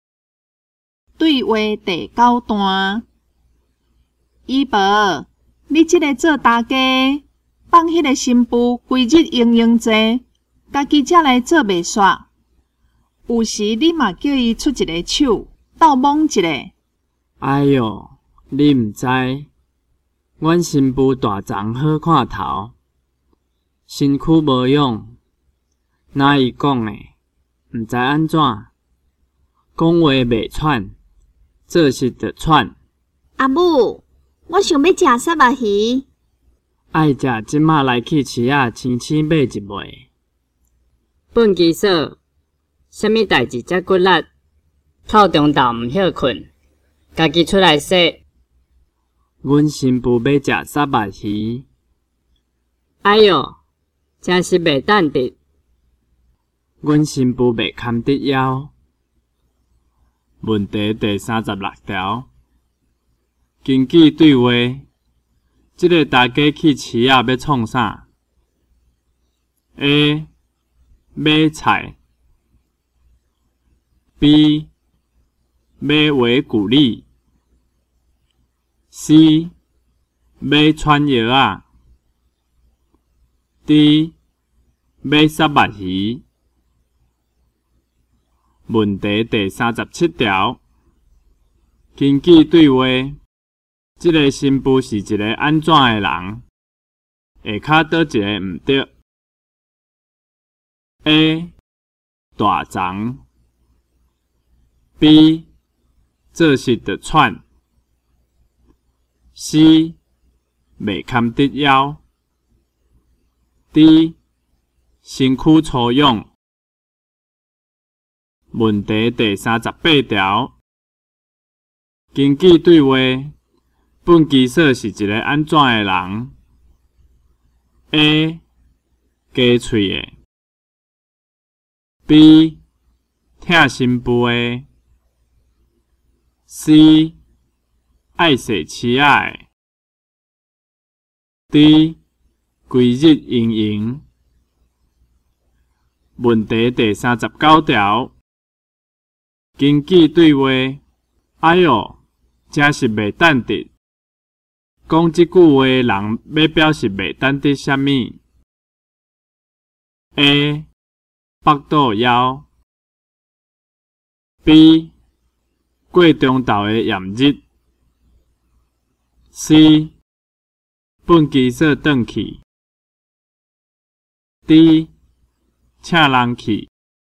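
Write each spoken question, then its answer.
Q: 根据对话,这个新妇是一个安怎的人?下脚倒一个唔对。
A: D: 身躯粗壮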